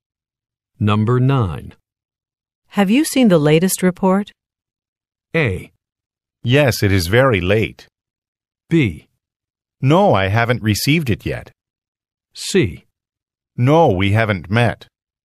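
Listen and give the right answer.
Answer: B: No, I haven't received it yet.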